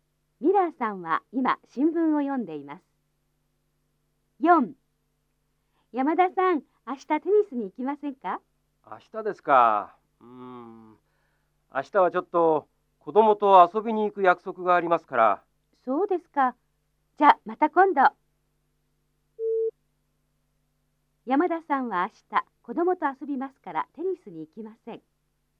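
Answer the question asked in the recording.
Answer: 正しい(○)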